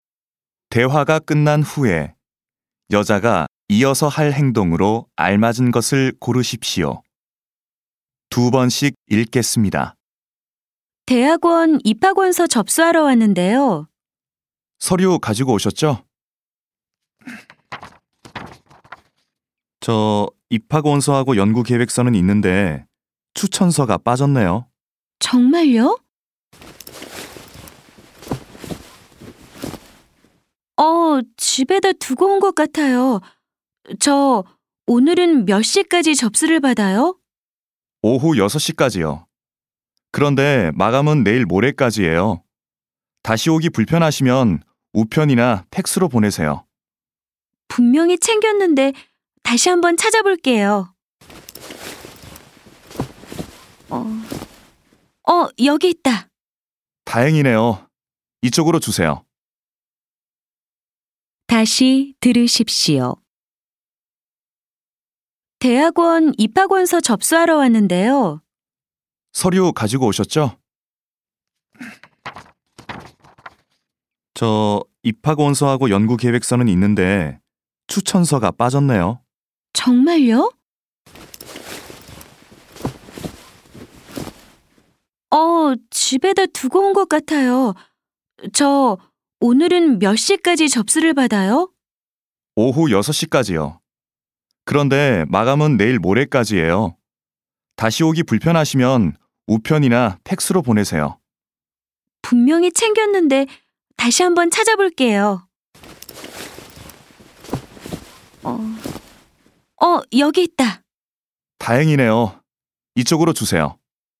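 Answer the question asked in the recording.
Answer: 서류(추천서)를 제출한다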